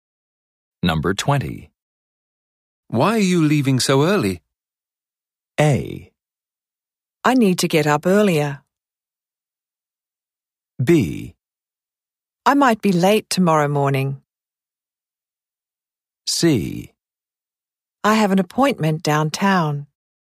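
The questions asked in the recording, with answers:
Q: Why are you leaving so early?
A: C: I have an appointment downtown.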